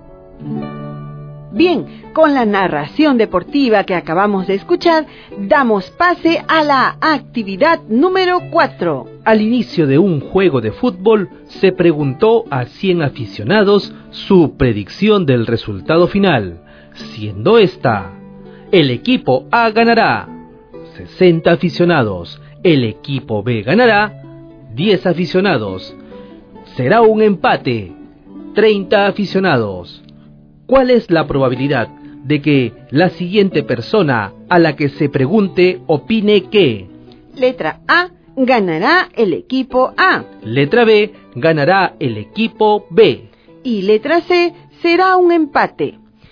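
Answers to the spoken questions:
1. 60/100 = 60%
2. 10/100 = 10%
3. 30/100 = 30%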